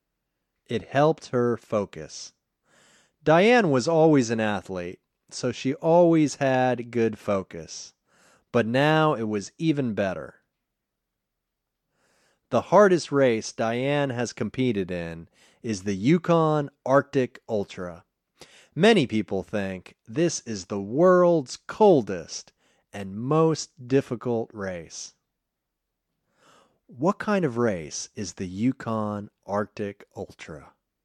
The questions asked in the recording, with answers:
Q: What kind of race is the Yukon Arctic Ultra?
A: It is the world's coldest and most difficult race.